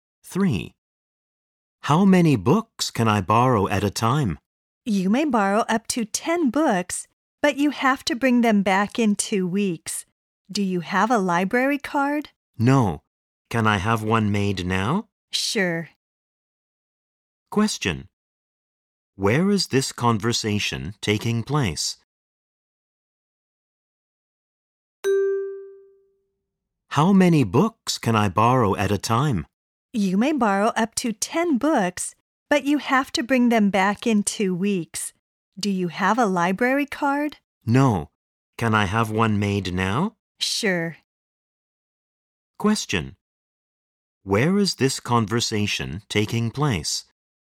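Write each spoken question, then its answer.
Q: Where is this conversation taking place?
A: In a library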